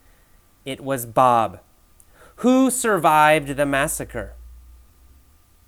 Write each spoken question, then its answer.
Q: Who survived the massacre?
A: Well, Bob survived the massacre.